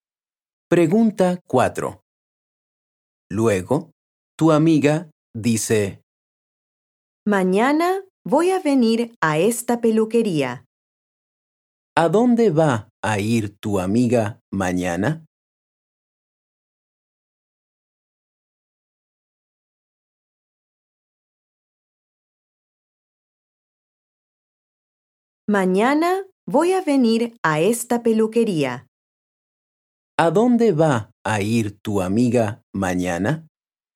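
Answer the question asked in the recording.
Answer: a la peluquería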